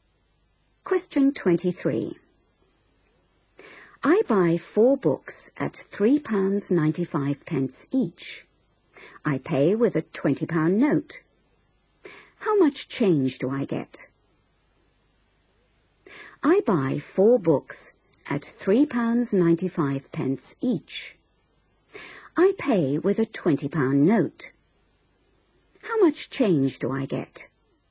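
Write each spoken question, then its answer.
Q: I pay with a £20 note. How much change do I get?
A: £4.20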